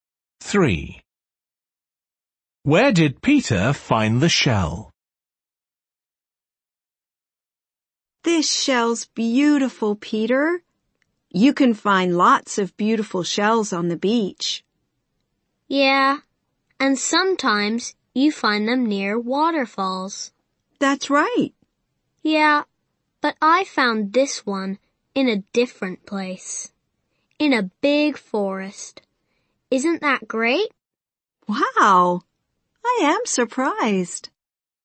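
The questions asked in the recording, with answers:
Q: Where did Peter find the shell?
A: In a big forest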